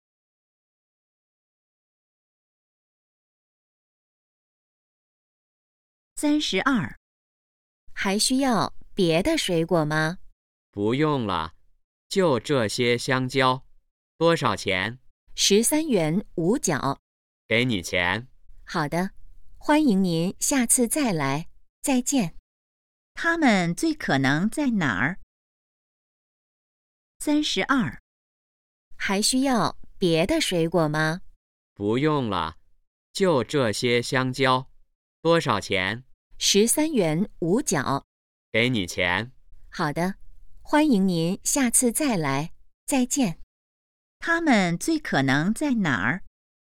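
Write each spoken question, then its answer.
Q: 他们最可能在哪儿?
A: 水果店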